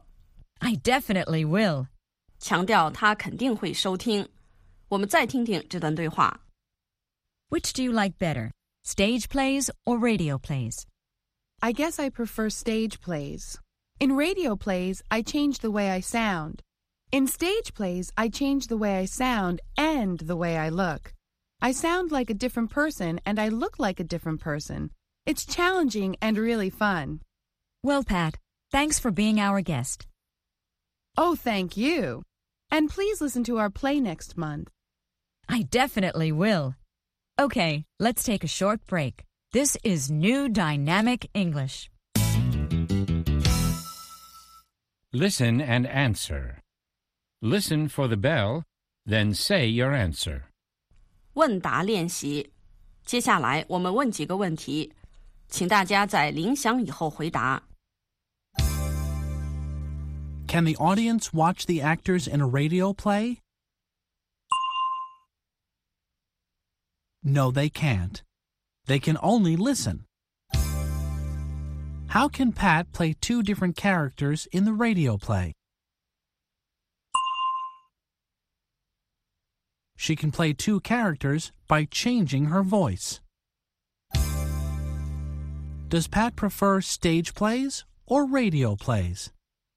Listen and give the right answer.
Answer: She prefers stage plays.